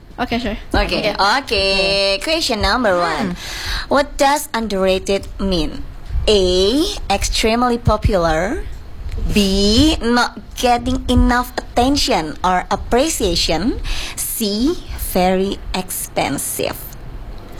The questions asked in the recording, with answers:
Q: What does underrated mean?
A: Appreciation.